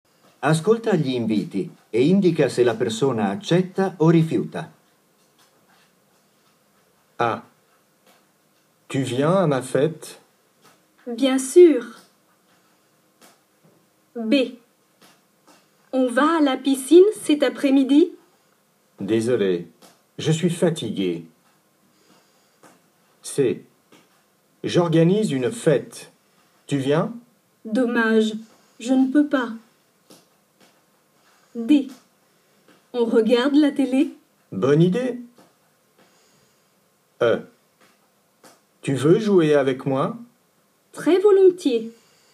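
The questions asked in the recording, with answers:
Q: Tu viens à ma fête?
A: accepte

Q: On va à la piscine cet après-midi?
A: refuse

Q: J'organise une fête. Tu viens?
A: refuse

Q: On regarde la télé?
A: accepte

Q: Tu veux jouer avec moi?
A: accepte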